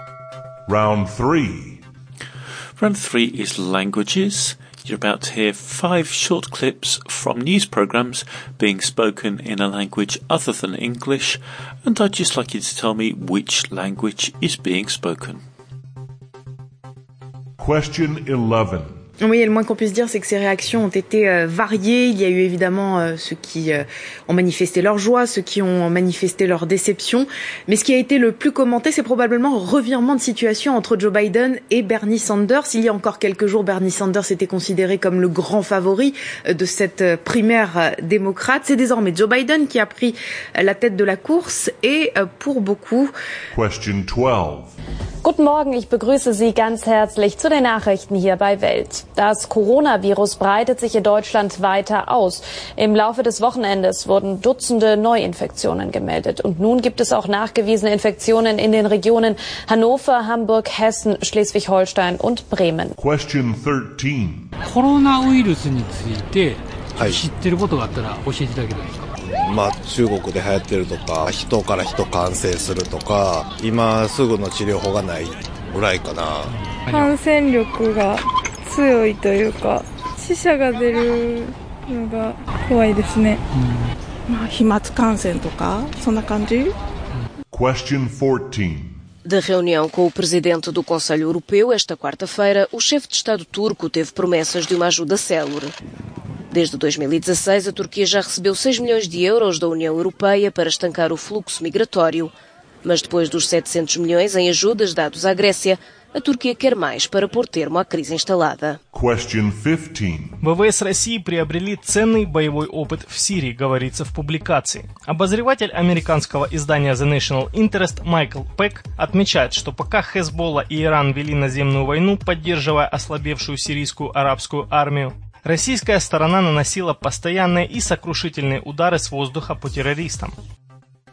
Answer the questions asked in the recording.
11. the answer to number 11 was French.
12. Number 12 was German.
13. Number 13 was Japanese.
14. Number 14 was Portuguese,
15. number 15 was Russian.